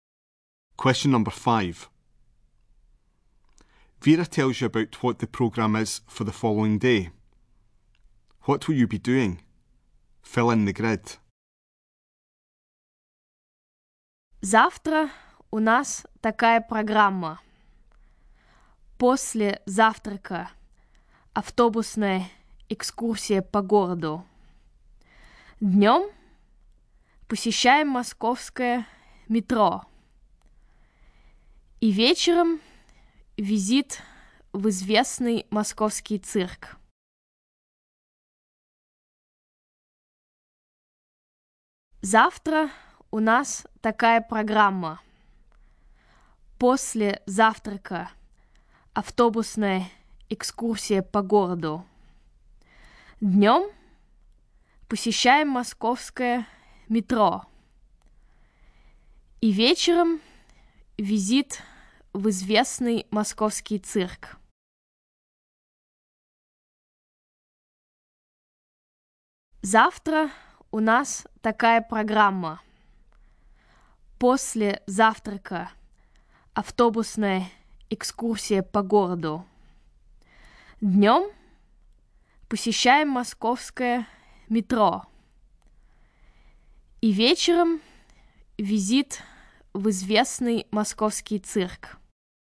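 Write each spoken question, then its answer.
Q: What will you be doing? Fill in the grid.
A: Morning: bus tour of the city; afternoon: visit the Moscow metro; evening: the Moscow circus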